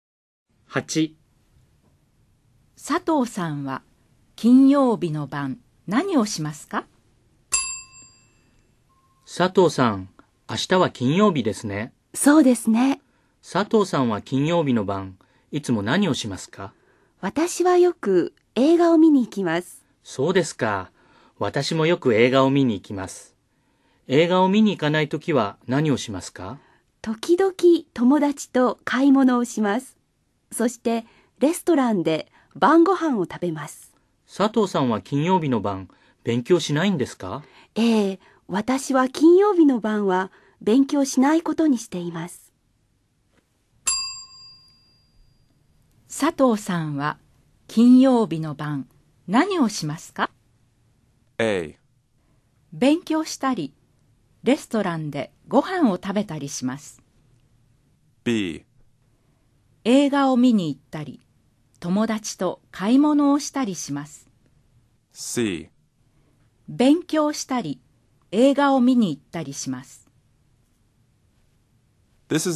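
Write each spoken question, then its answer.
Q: 佐藤さんは金曜日の晩何をしますか?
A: B: 映画を見に行ったり友達と買い物をしたりします。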